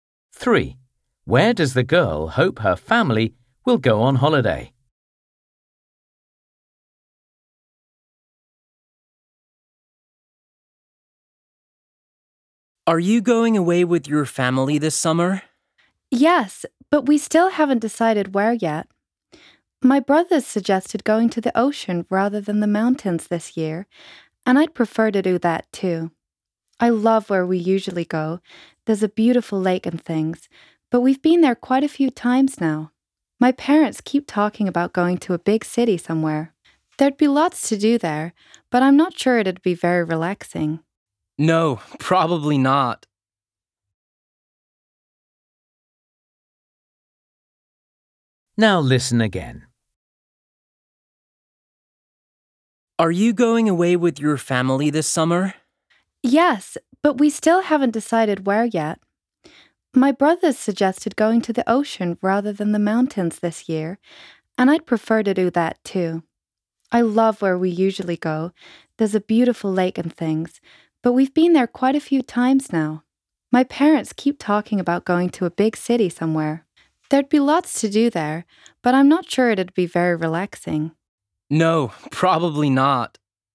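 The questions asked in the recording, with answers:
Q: Where does the girl hope her family will go on holiday?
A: the ocean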